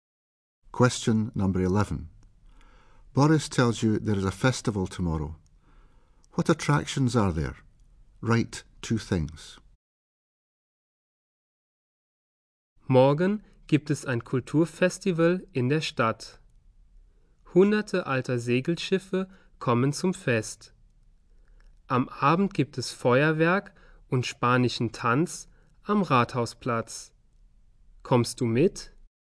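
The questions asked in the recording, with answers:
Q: What attractions are there?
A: Hundreds of old sailing ships; fireworks and Spanish dancing in the evening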